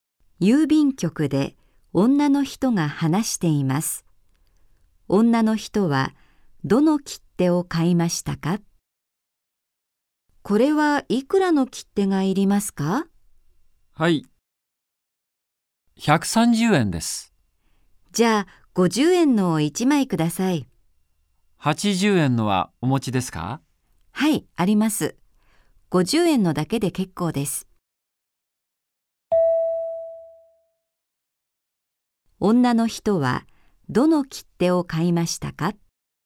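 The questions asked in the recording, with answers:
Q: 女の人はどの切手を買いましたか?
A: 50円の切手を1枚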